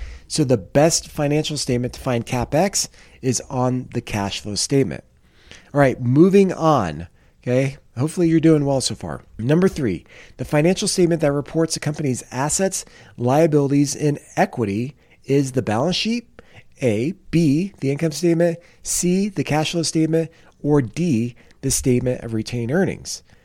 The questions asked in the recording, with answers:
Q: the financial statement that reports a company's assets, liabilities, and equity is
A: if you answered A, the balance sheet, you are correct.